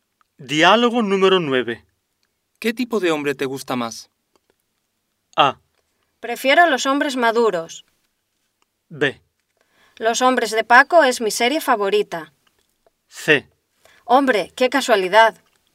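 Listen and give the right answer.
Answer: A: Prefiero los hombres maduros.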